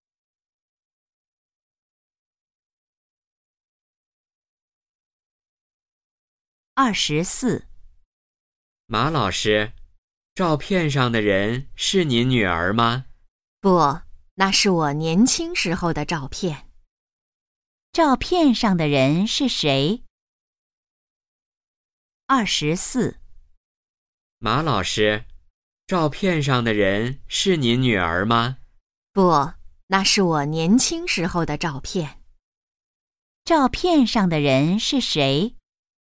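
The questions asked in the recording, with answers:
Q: 照片上的人是谁?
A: 马老师自己(年轻时)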